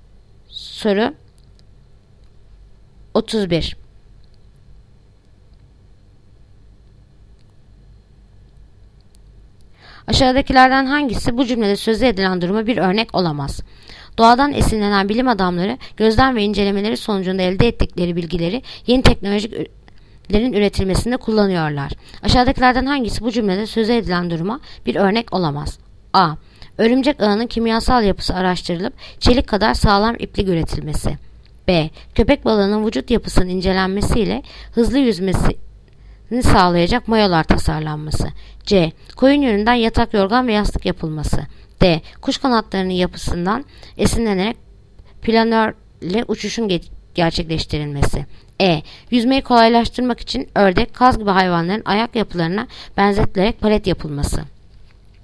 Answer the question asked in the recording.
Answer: Yanıt Ceyhan. Koyun yününden yatak, yorgan ve yastık yapılması.